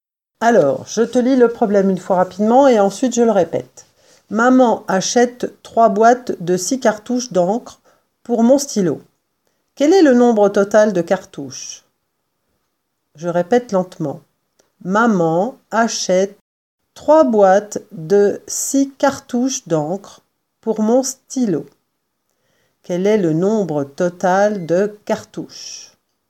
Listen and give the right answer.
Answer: Le nombre total de cartouches est 18